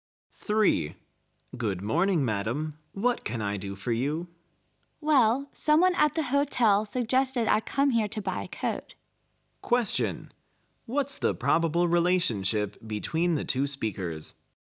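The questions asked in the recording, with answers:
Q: What's the probable relationship between the two speakers?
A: Shop assistant and customer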